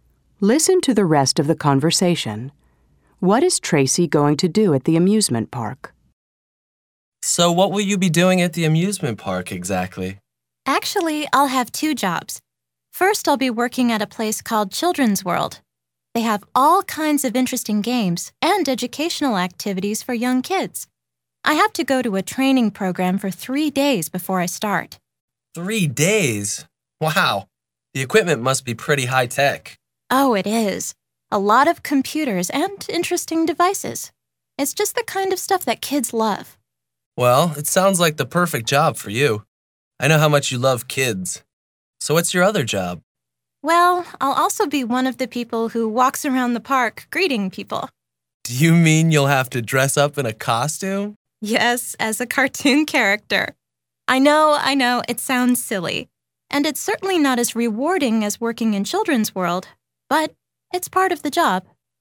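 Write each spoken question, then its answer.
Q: What is Tracy going to do at the amusement park?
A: Work at Children's World with kids' games and educational activities, and walk around the park greeting people dressed as a cartoon character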